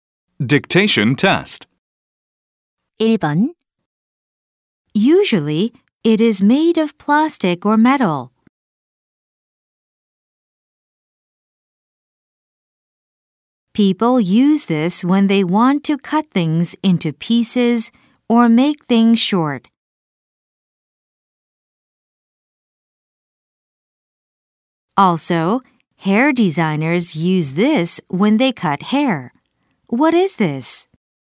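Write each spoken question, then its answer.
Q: What is this?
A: scissors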